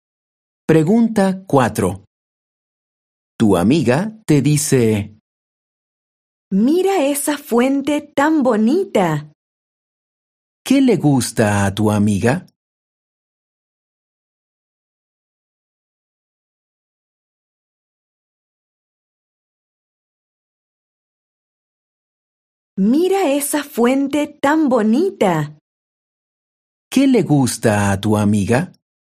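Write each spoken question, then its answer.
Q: ¿Qué le gusta a tu amiga?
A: la fuente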